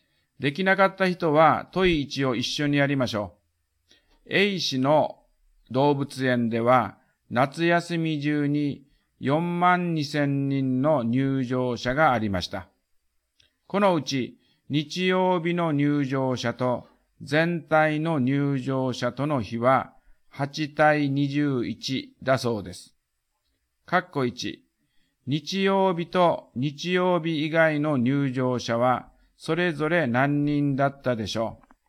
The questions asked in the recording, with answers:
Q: 括弧1、日曜日と日曜日以外の入場者はそれぞれ何人だったでしょう。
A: 日曜日が1万6000人。